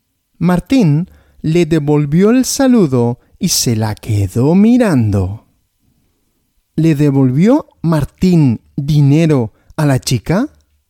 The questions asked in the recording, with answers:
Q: ¿Le devolvió Martín dinero a la chica?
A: No, dinero no.